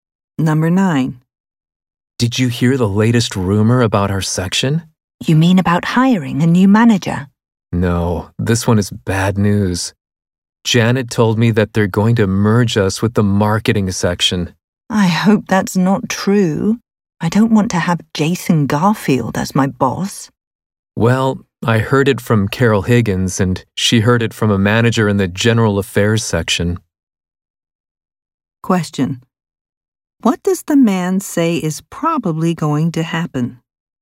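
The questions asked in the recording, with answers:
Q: what does the man say is probably going to happen?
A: Their section will be merged with the marketing section.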